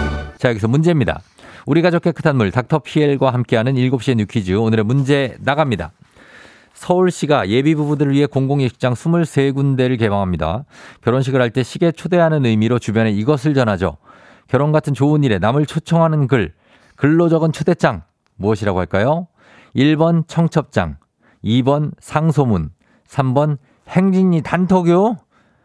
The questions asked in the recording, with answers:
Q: 결혼 같은 좋은 일에 남을 초청하는 글, 글로 적은 초대장 무엇이라고 할까요?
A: 정답은 1번 청첩장입니다.